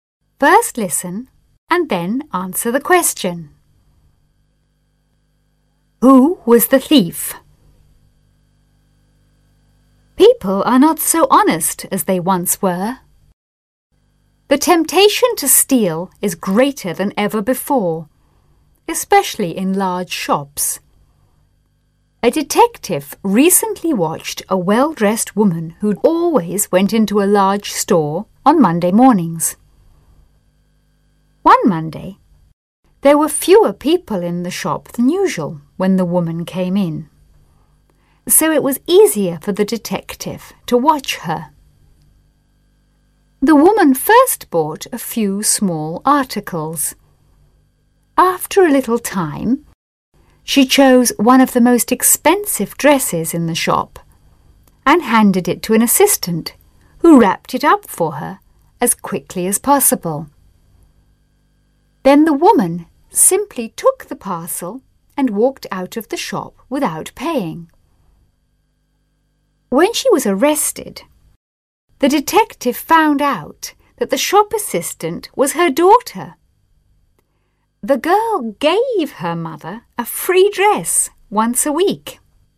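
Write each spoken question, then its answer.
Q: Who was the thief?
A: The shop assistant (the woman's daughter), along with her mother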